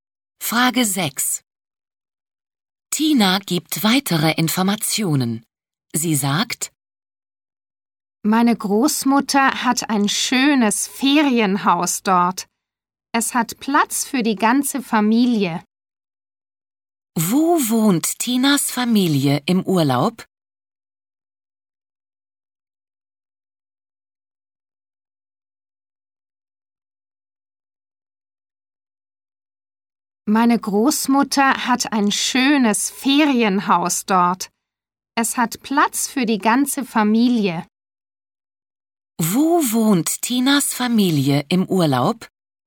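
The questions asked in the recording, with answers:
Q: Wo wohnt Tinas Familie im Urlaub?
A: Im Ferienhaus der Großmutter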